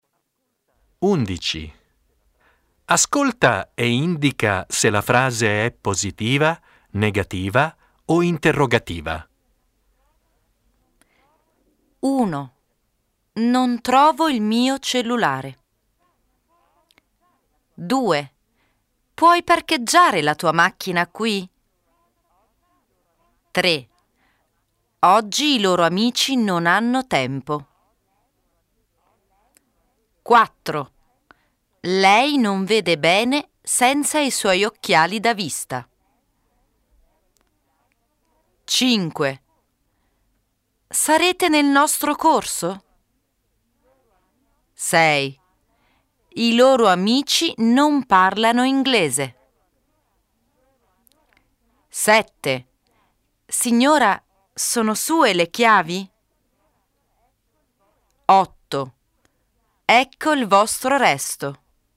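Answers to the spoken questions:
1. negativa
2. interrogativa
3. negativa
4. negativa
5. interrogativa
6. negativa
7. interrogativa
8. positiva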